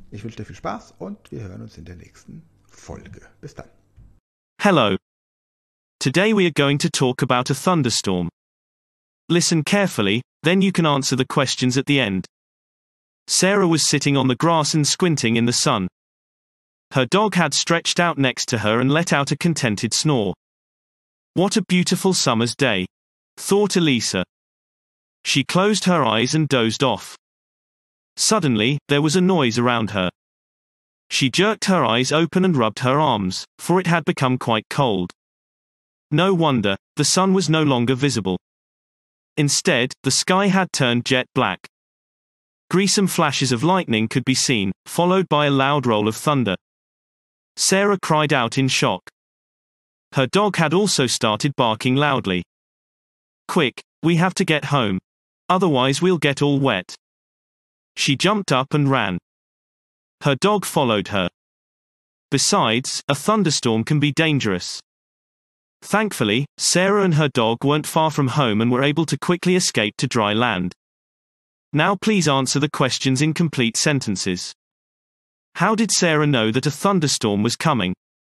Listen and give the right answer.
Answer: she realized that a thunderstorm was coming because it suddenly became loud and cold around her.